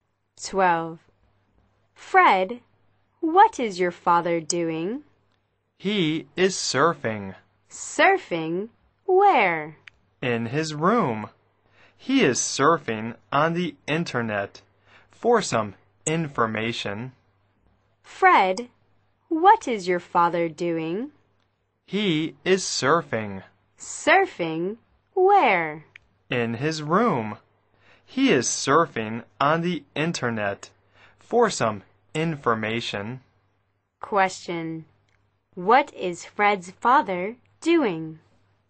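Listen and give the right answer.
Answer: Surfing the internet for information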